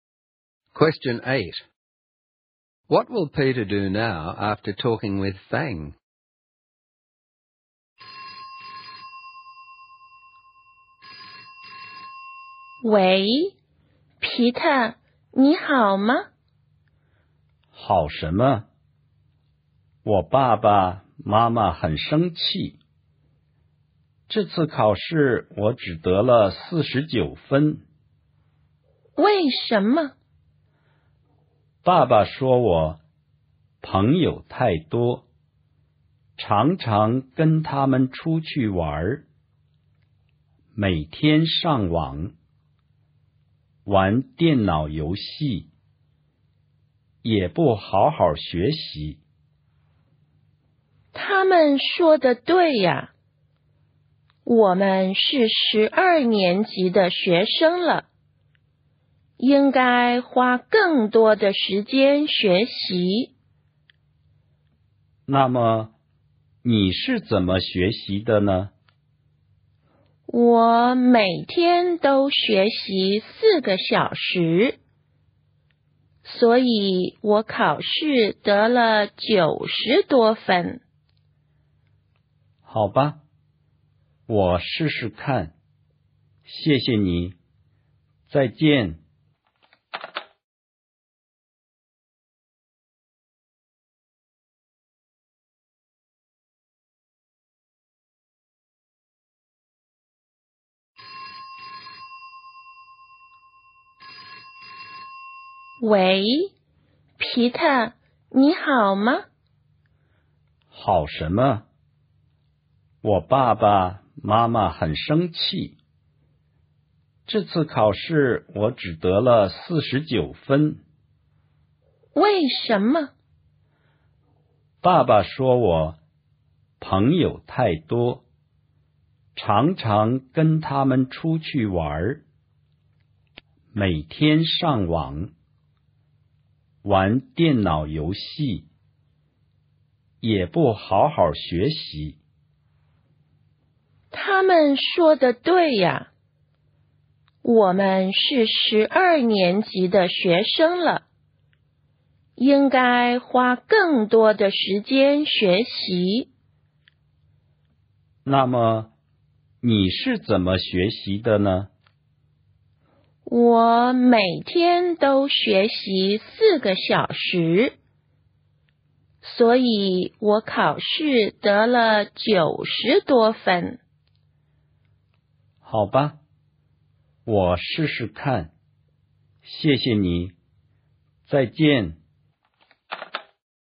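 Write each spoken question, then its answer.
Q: What will Peter do now after talking with Fang?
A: Try to study more, like Fang's four hours a day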